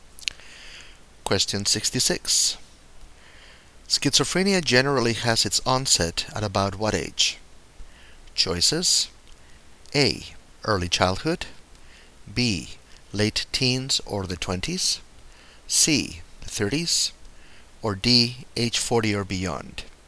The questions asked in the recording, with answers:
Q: Schizophrenia generally has its onset at about what age?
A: The correct choice is B. Late teens or 20s.